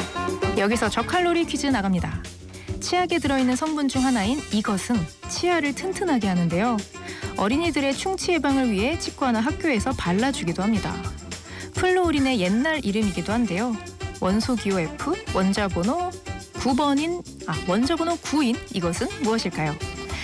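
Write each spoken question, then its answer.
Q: 원소 기호 F, 원자번호 9번인, 원자번호 9인 이것은 무엇일까요?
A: 불소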